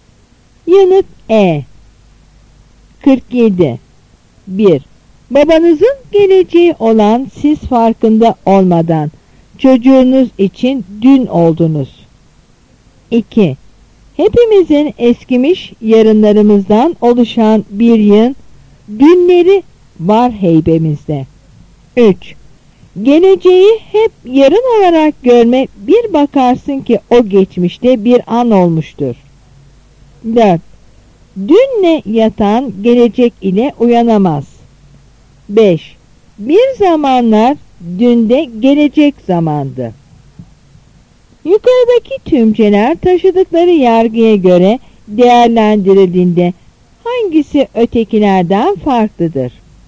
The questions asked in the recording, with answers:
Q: Yukarıdaki tümceler taşıdıkları yargıya göre değerlendirildiğinde hangisi ötekilerden farklıdır?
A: Yanıt D.